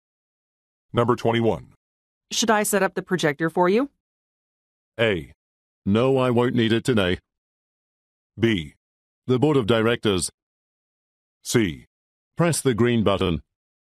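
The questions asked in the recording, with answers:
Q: Should I set up the projector for you?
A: A: No, I won't need it today.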